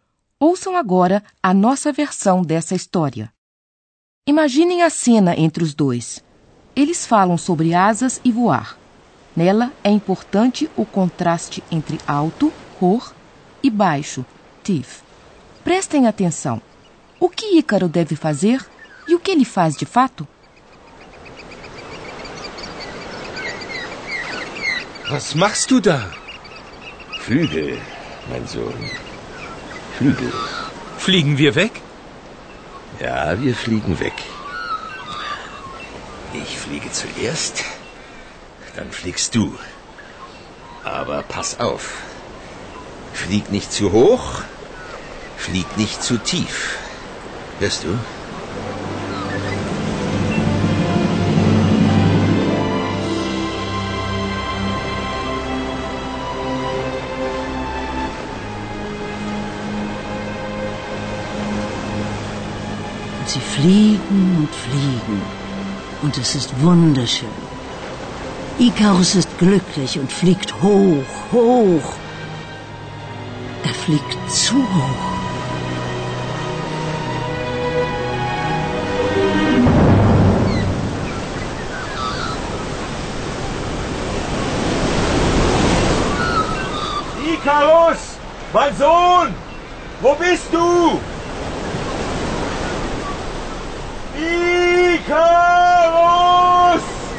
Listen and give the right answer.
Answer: Em um arroubo de felicidade, Ícaro voa muito